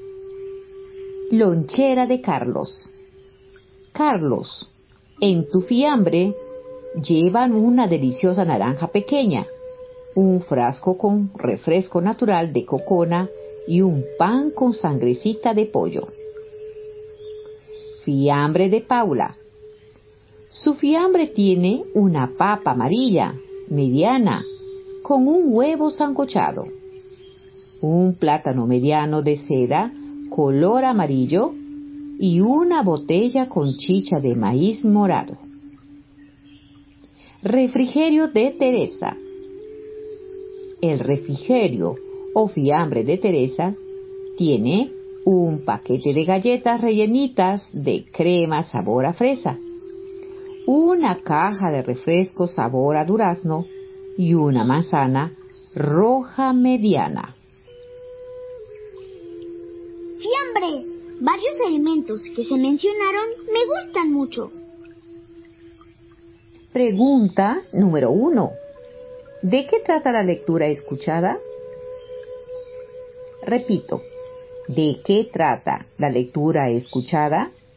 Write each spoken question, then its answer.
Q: ¿De qué trata la lectura escuchada?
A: Trata de los fiambres de tres personas.